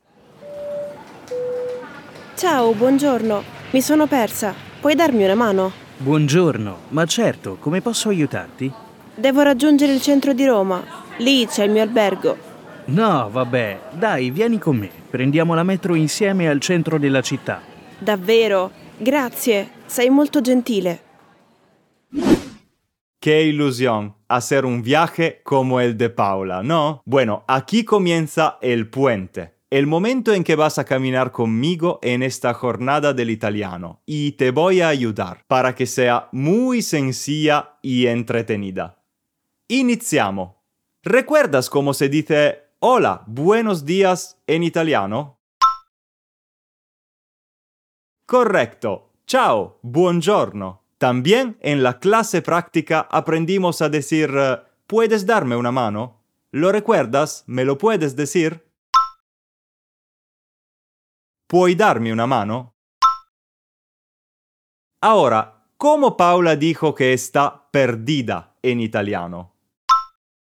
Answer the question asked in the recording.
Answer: Exacto, mi sono persa.